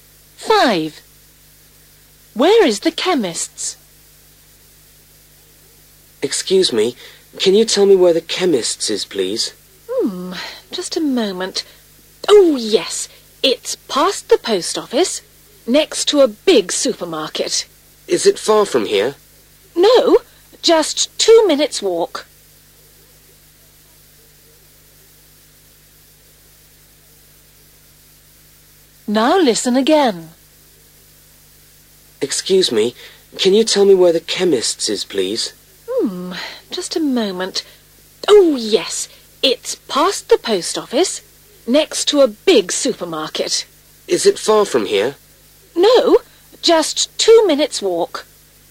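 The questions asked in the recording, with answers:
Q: Where is the chemist's?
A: past the post office, next to a big supermarket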